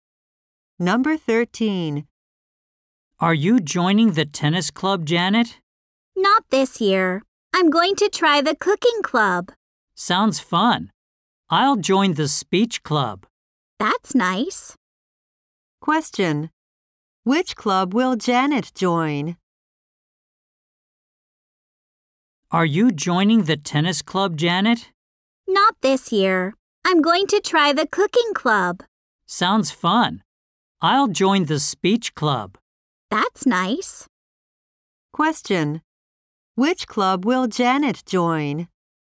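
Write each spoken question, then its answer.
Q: Which club will Janet join?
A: The cooking club.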